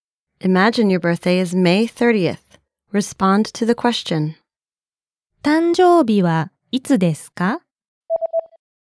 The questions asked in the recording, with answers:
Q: 誕生日はいつですか?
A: 5月30日です。